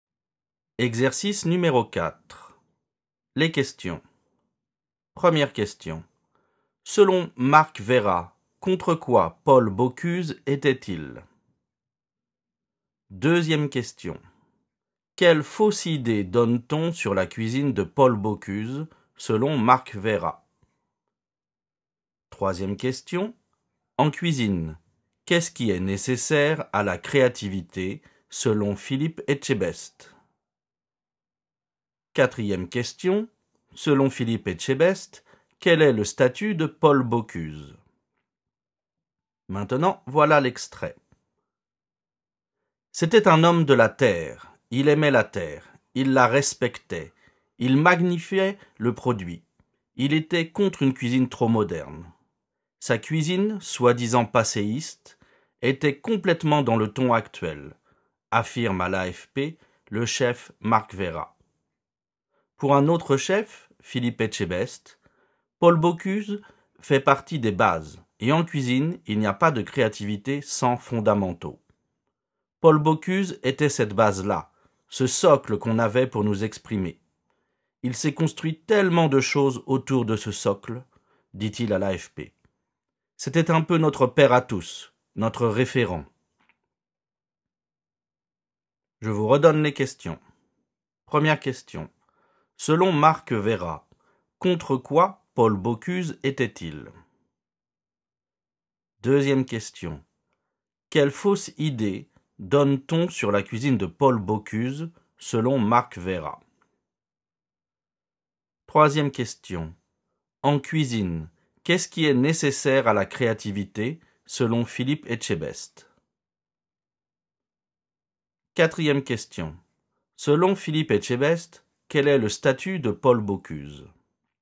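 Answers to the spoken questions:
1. Contre une cuisine trop moderne
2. Qu'elle serait passéiste
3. Les fondamentaux
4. Une base, un socle, notre père à tous, notre référent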